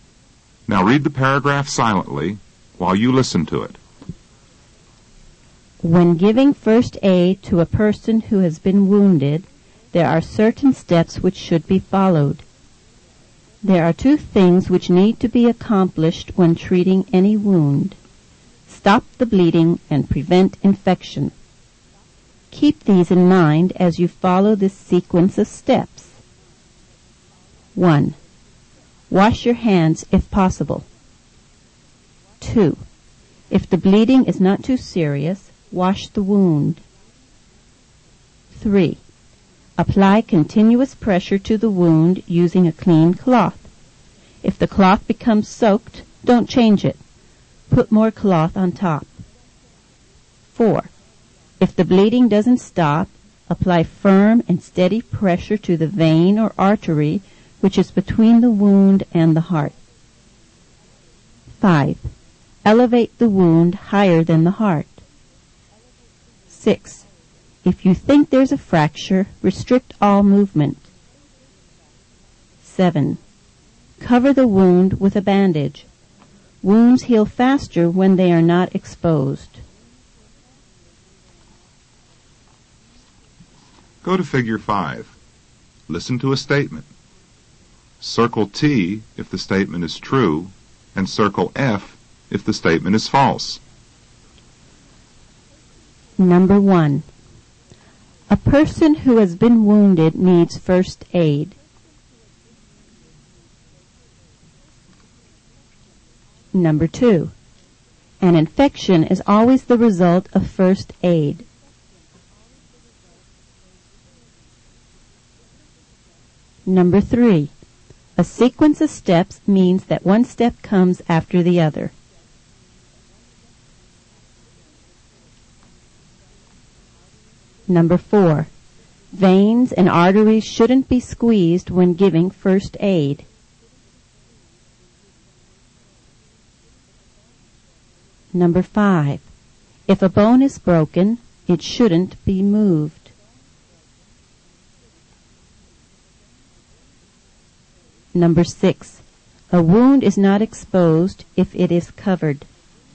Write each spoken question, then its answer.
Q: A person who has been wounded needs first aid.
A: Number 1 is true.

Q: An infection is always the result of first aid.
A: Number 2 is false.

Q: A sequence of steps means that one step comes after the other.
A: Number 3 is true.

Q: Veins and arteries shouldn't be squeezed when giving first aid.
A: Number 4 is false.

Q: If a bone is broken, it shouldn't be moved.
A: Number 5 is true.

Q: A wound is not exposed if it is covered.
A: Number 6 is also true.